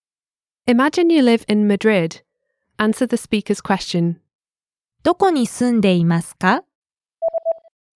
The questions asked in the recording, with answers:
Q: どこに住んでいますか?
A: マドリードに住んでいます。